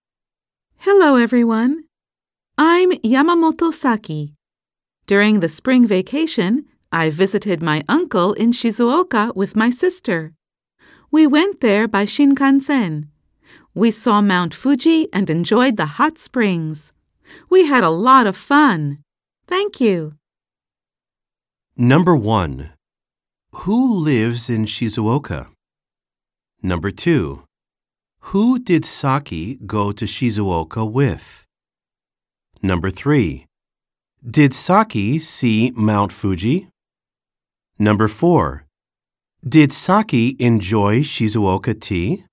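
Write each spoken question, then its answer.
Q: Who lives in Shizuoka?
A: Saki's uncle

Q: Who did Saki go to Shizuoka with?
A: Her sister

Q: Did Saki see Mount Fuji?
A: Yes, she did.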